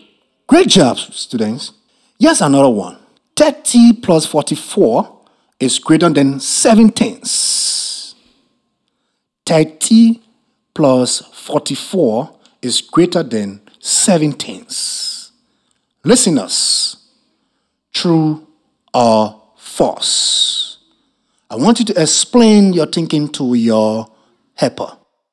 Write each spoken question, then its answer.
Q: Listeners, true or false?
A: It's true.